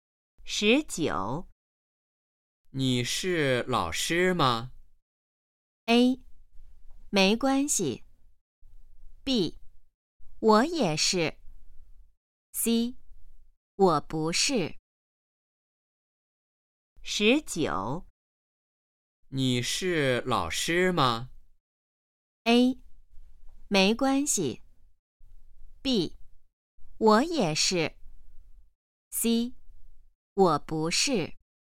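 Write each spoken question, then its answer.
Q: 你是老师吗?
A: C: 我不是。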